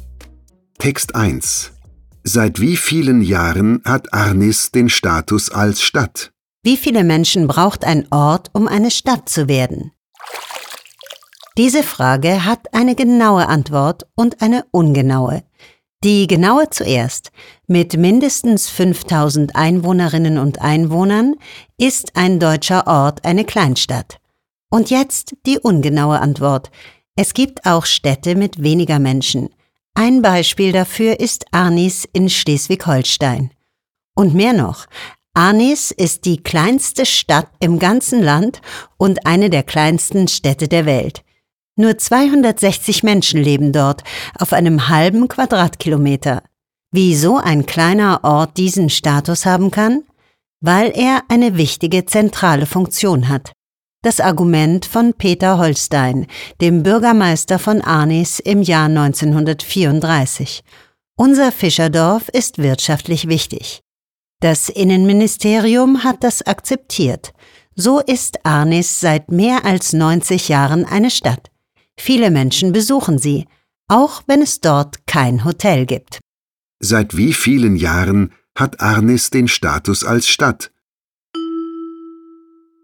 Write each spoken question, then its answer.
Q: Seit wie vielen Jahren hat Arnis den Status als Stadt?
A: Seit mehr als 90 Jahren hat Arnis in Schleswig-Holstein den Status einer Stadt.